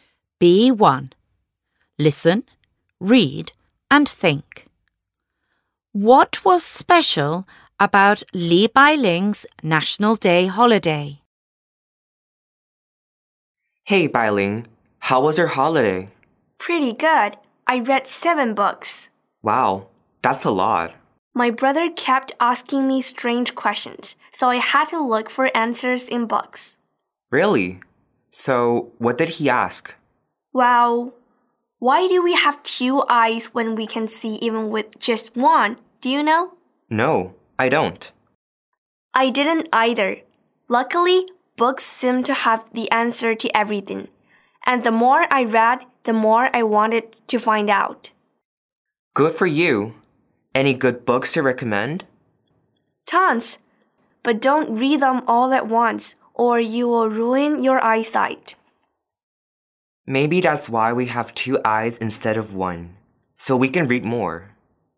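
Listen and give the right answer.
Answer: She read 7 books to find answers to her brother's strange questions.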